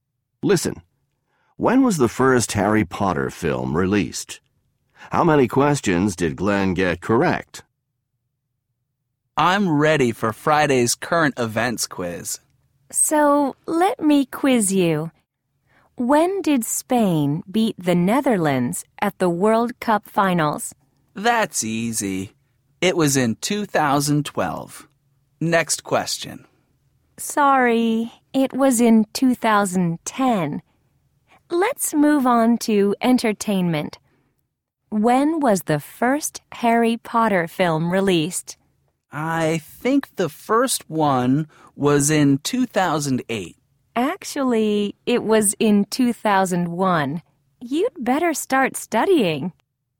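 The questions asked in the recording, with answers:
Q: When was the first Harry Potter film released?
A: In 2001

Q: How many questions did Glenn get correct?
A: None (zero)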